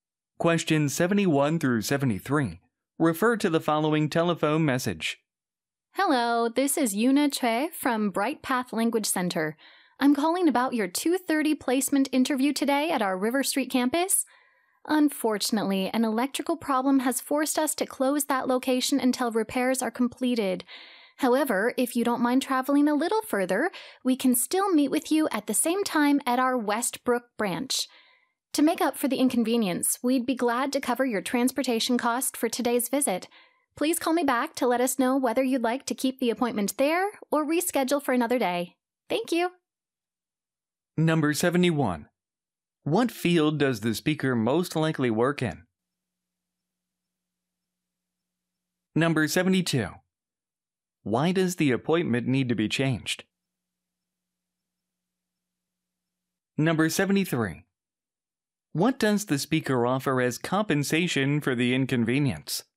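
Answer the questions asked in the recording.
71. Language education
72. An electrical problem forced the location to close
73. To cover transportation costs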